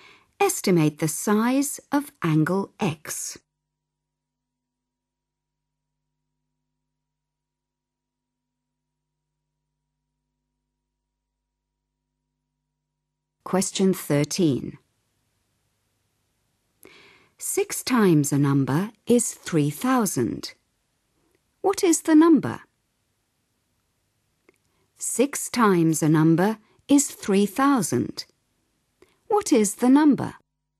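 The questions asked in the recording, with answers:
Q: What is the number?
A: 500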